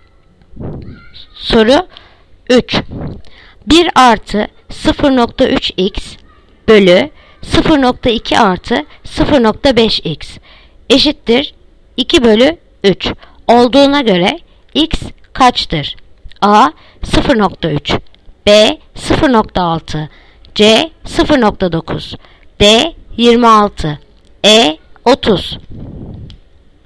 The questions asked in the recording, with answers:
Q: 1 artı 0.3x bölü 0.2 artı 0.5x eşittir 2 bölü 3 olduğuna göre x kaçtır?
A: Yanıt Diyarbakır 26.